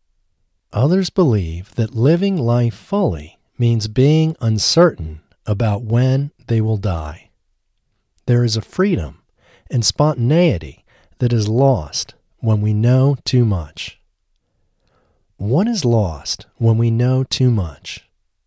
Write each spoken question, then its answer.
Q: What is lost when we know too much?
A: Freedom and spontaneity is lost when we know too much.